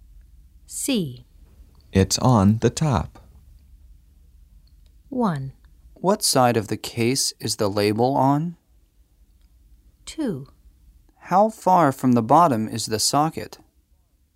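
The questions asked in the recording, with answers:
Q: It's on the top.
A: 1: What side of the case is the label on?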